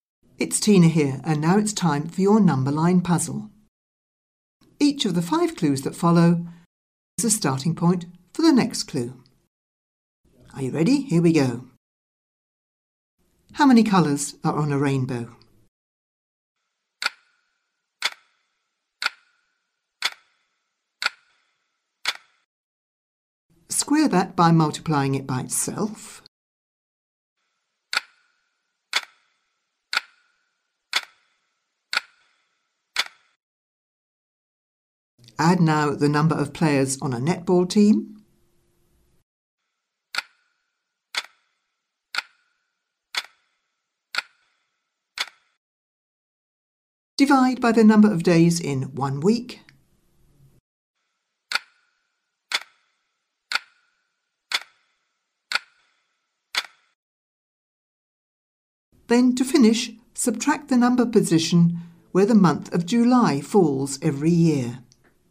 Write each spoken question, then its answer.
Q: Then, to finish, subtract the number position where the month of July falls every year.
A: Did you finish at one?